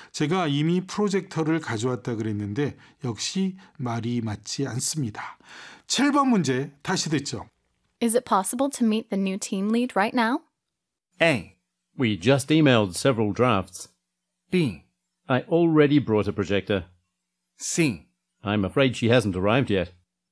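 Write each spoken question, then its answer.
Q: Is it possible to meet the new team lead right now?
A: C: I'm afraid she hasn't arrived yet.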